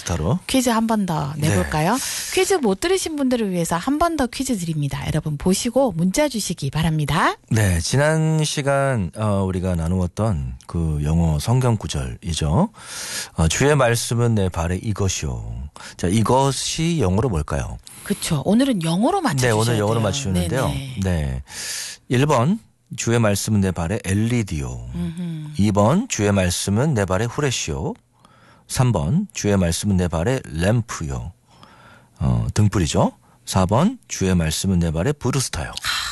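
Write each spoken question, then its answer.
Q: 주의 말씀은 내 발의 이것이요. 자, 이것이 영어로 뭘까요?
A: 3: 주의 말씀은 내 발의 램프요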